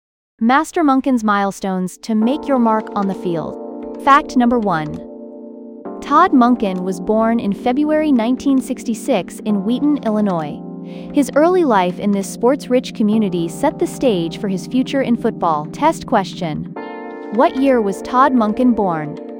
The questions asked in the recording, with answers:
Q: What year was Todd Monken born?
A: Correct answer, 1966.